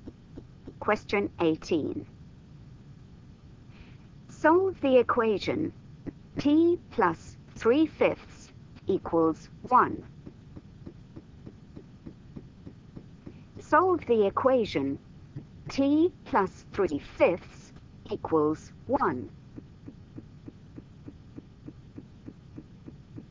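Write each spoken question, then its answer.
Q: Solve the equation T plus 3/5 equals 1.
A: 2/5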